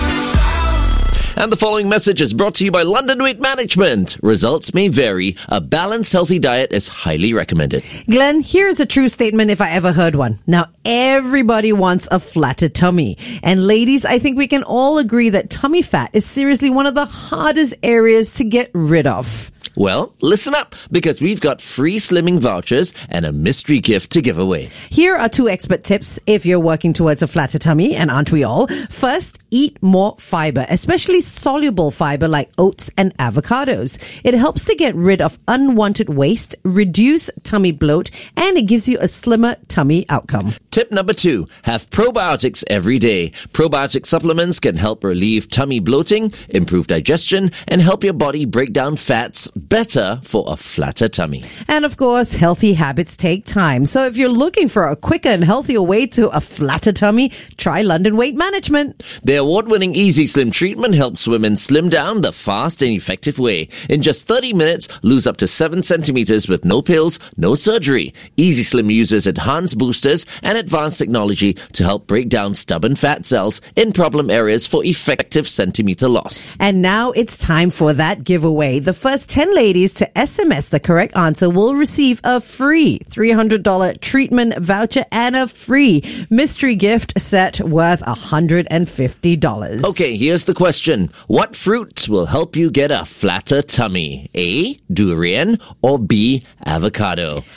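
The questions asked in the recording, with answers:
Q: What fruits will help you get a flatter tummy?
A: B: avocado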